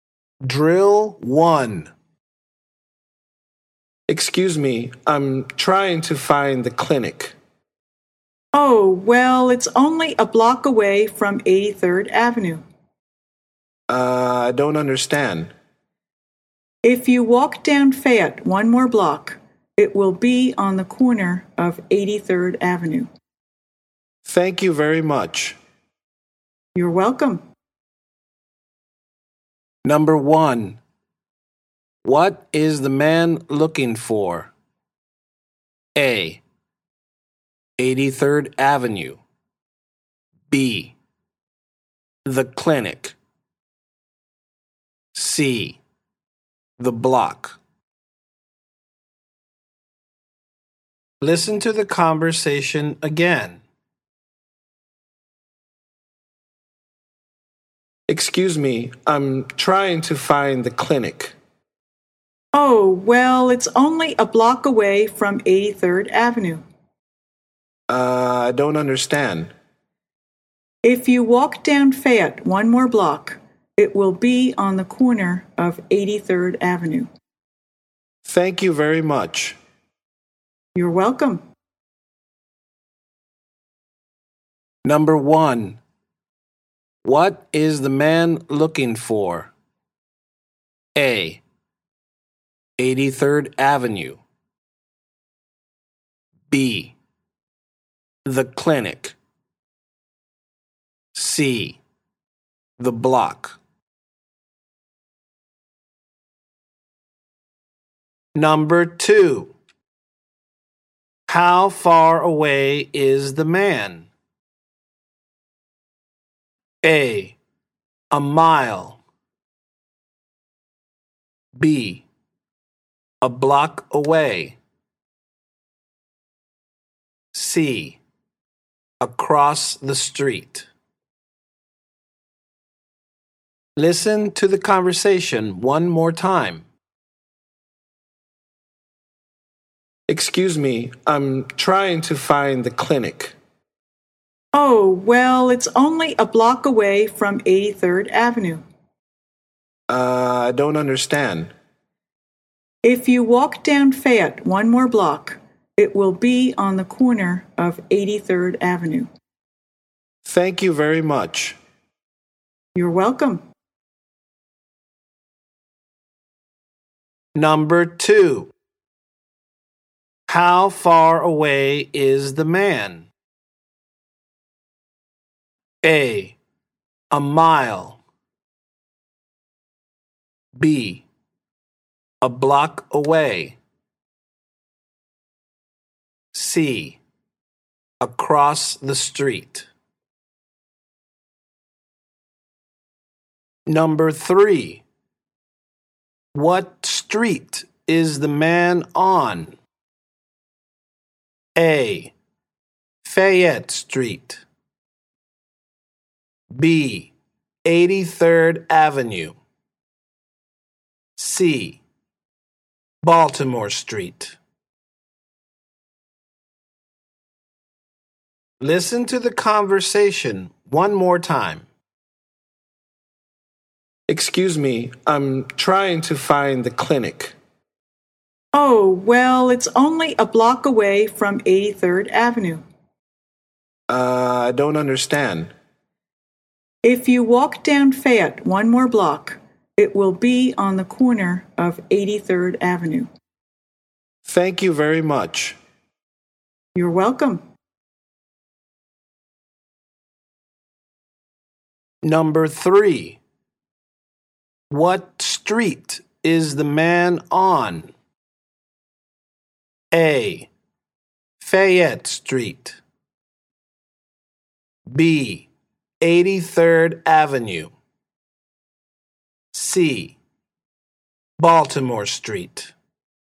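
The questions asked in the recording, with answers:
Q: What is the man looking for?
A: B: The clinic.

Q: How far away is the man?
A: B: 1 block away.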